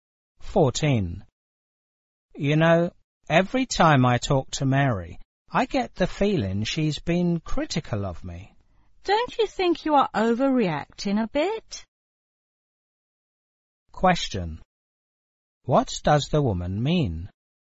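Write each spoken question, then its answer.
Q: What does the woman mean?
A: The man is overreacting; Mary probably isn't critical of him.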